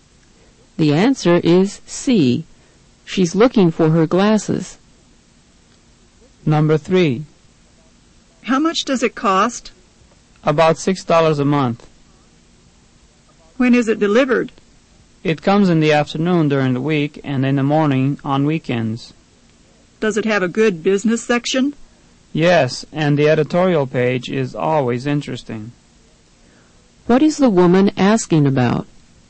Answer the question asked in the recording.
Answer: The answer is C. She's asking about a newspaper.